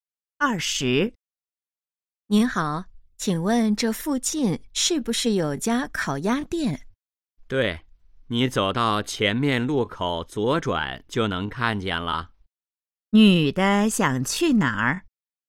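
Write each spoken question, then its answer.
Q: 女的想去哪儿?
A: 烤鸭店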